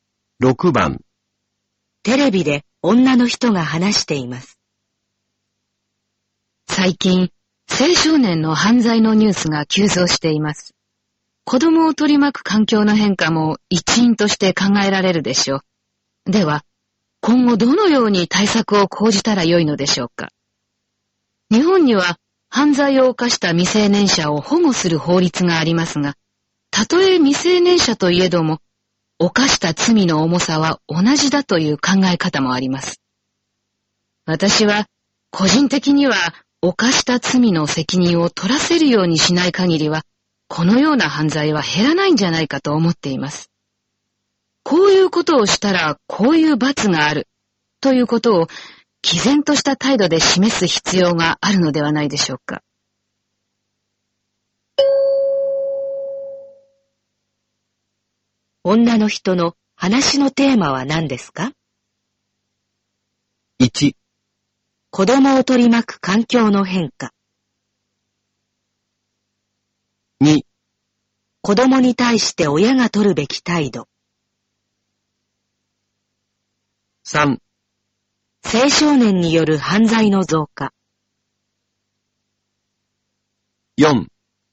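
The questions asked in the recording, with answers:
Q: 女の人の話のテーマは何ですか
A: 4: 青少年の犯罪への対応策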